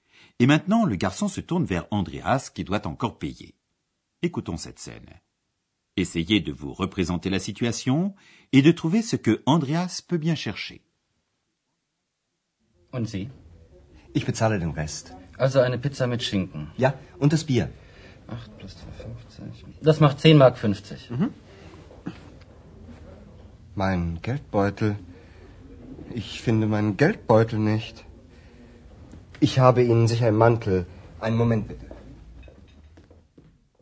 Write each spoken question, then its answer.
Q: Essayez de vous représenter la situation et de trouver ce que Andreas peut bien chercher.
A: Mais Andreas ne trouve pas son porte-monnaie.